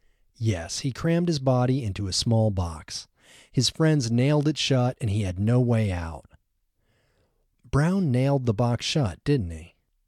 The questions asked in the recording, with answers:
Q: Brown nailed the box shut, didn't he?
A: No, Brown didn't nail the box shut.